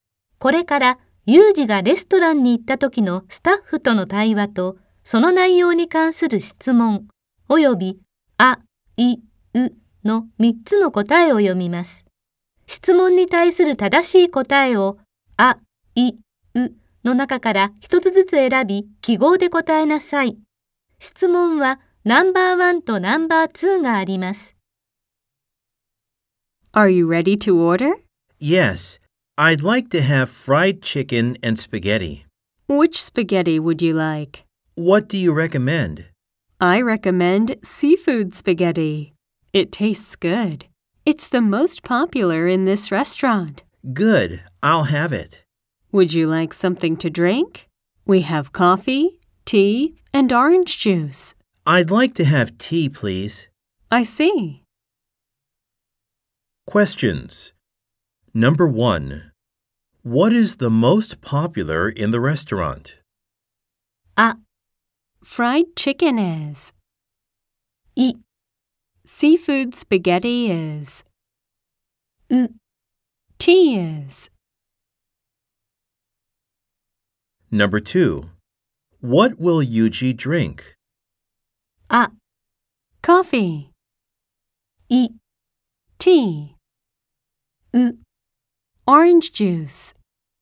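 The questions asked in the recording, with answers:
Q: What is the most popular in the restaurant?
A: い: Seafood spaghetti is.

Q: What will Yuji drink?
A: い: Tea.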